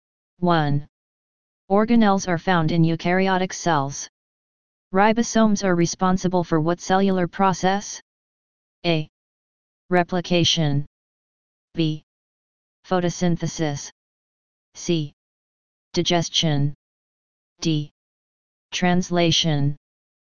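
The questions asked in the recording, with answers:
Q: Organelles are found in eukaryotic cells. Ribosomes are responsible for what cellular process?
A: D: Translation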